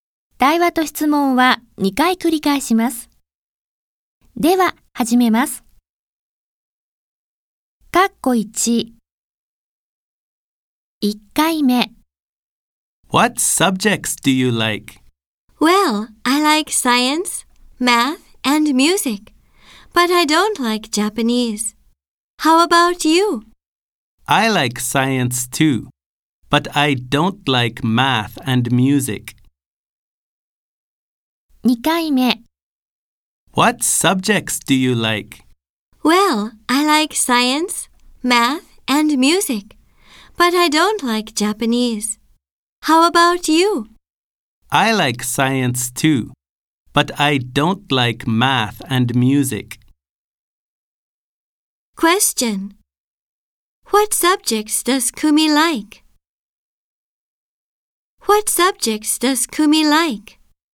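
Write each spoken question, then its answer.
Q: What subjects does Kumi like?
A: Science, math, and music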